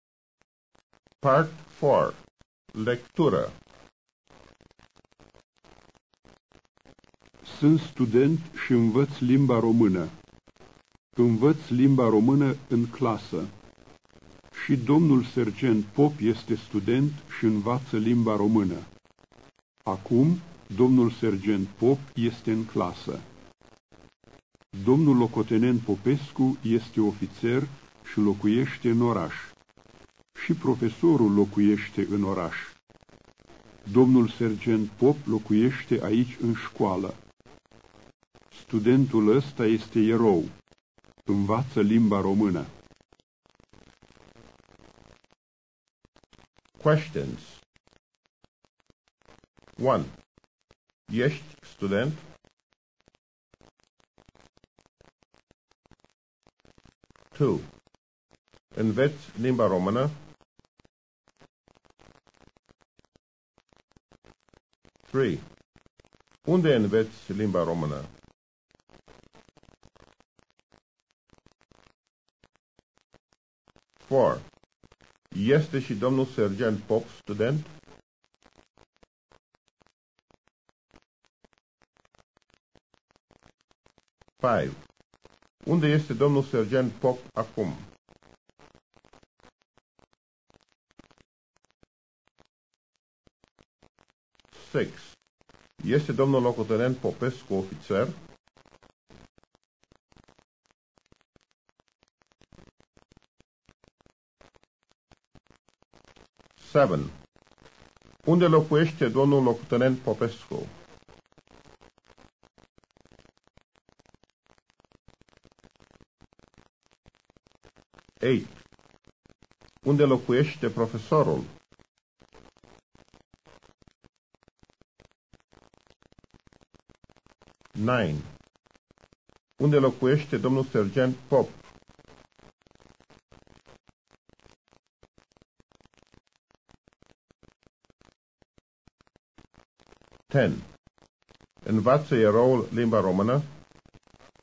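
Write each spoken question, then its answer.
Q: Ești student?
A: Da, sunt student.

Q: Înveți limba română?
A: Da, învăț limba română.

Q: Unde înveți limba română?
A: În clasă.

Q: Este și domnul sergent Pop student?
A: Da.

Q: Unde este domnul sergent Pop acum?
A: În clasă.

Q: Este domnul locotenent Popescu ofițer?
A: Da.

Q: Unde locuiește domnul locotenent Popescu?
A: În oraș.

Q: Unde locuiește profesorul?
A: În oraș.

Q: Unde locuiește domnul sergent Pop?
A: Aici în școală.

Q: Învață eroul limba română?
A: Da.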